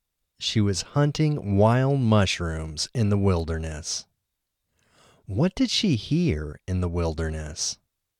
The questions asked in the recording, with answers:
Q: What did she hear in the wilderness?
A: She heard the growl of a wolf in the wilderness.